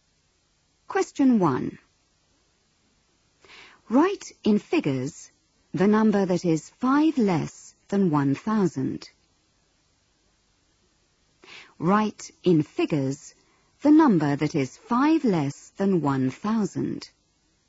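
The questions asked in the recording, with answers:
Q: Write in figures the number that is 5 less than 1,000.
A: 995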